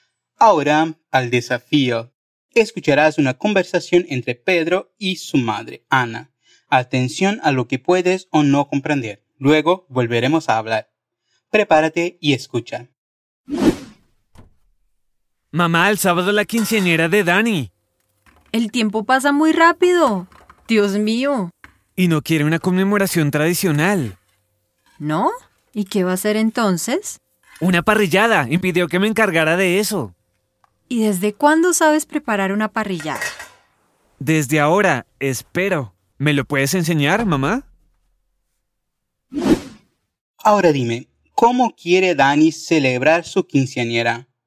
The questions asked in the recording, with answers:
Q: ¿cómo quiere Dani celebrar su quinceañera?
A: Una parrillada.